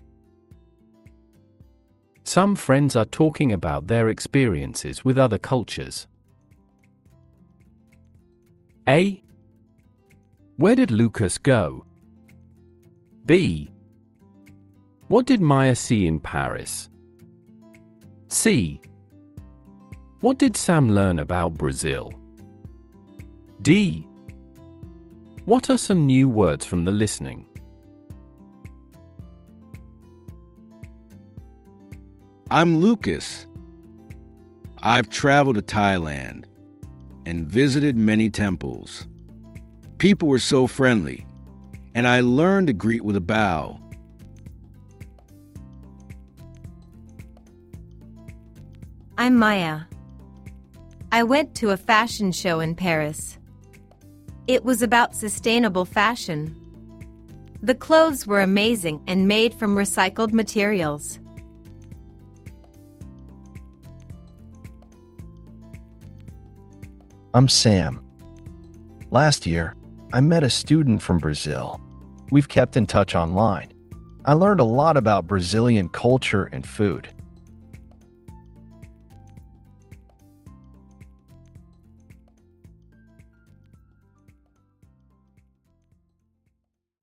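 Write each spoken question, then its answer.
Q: Where did Lucas go?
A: Thailand

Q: What did Maya see in Paris?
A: A sustainable fashion show

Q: What did Sam learn about Brazil?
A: Brazilian culture and food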